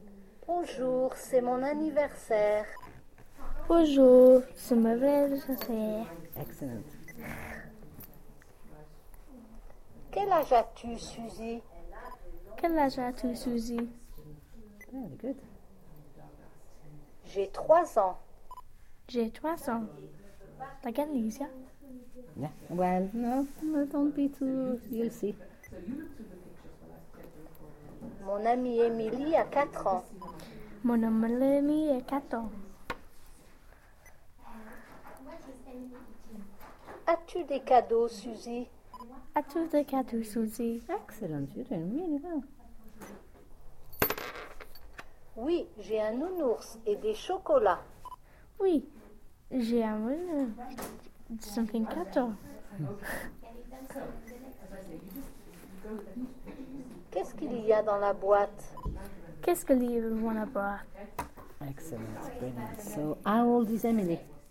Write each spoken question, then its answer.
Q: So, how old is Emily?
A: It said, mon amie Emily a 4 ans.